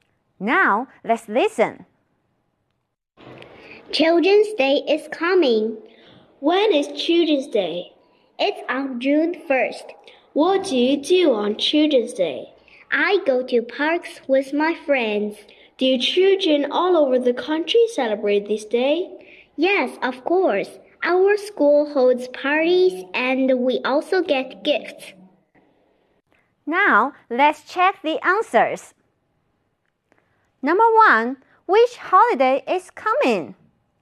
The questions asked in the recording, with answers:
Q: which holiday is coming?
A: 对了,选 C, Children's Day. 儿童节要到来了。